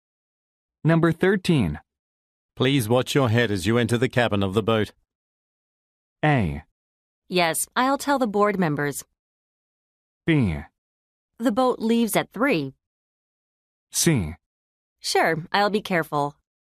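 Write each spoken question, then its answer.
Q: Please watch your head as you enter the cabin of the boat.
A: C: Sure, I'll be careful.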